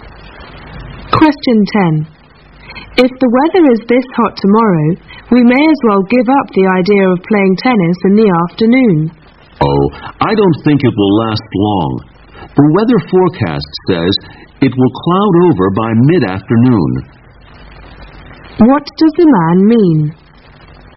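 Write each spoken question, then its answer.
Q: What does the man mean?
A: The hot weather won't last, so they may still be able to play tennis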